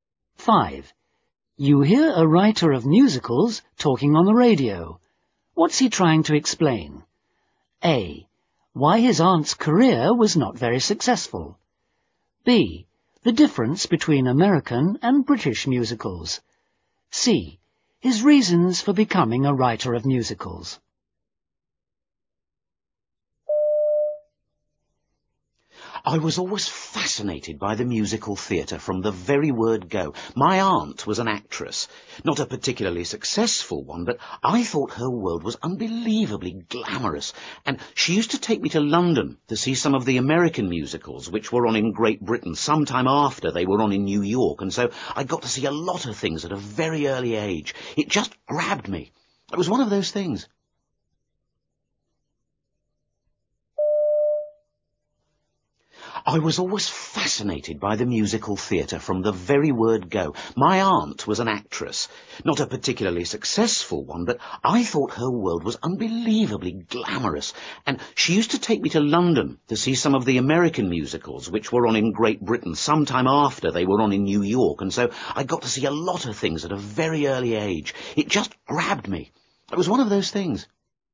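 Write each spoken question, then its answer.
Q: What's he trying to explain?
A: C: His reasons for becoming a writer of musicals.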